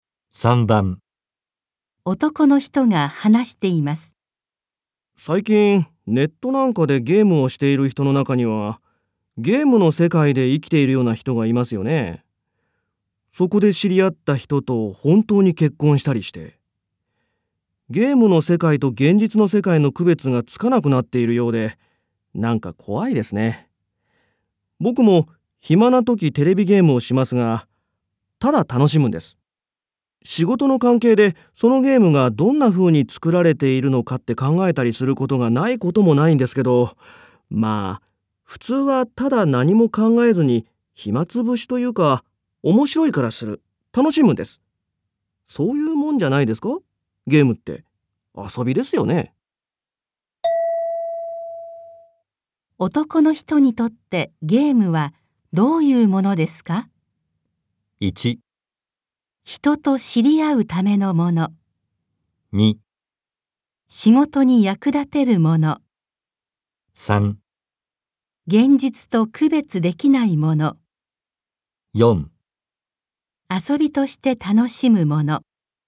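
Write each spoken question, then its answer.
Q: 男の人にとってゲームはどういうものですか?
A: 4: 遊びとして楽しむもの。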